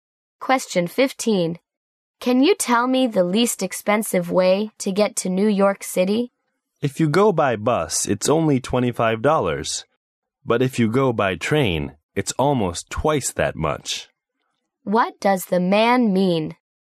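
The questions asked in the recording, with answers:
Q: What does the man mean?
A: Going by bus is the cheapest way, only $25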